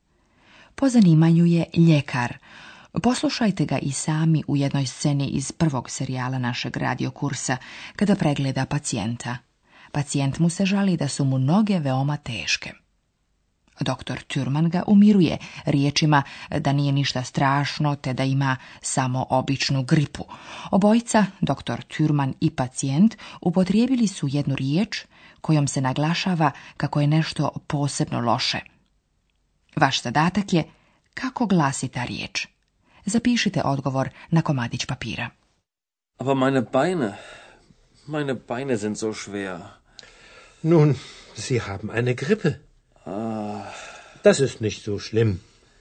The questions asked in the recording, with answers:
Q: Vaš zadatak je kako glasi ta riječ.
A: To je riječ zo.